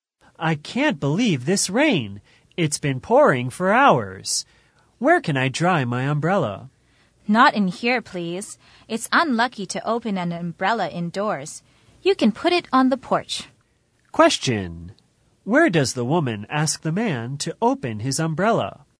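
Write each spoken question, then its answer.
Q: Where does the woman ask the man to open his umbrella?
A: On the porch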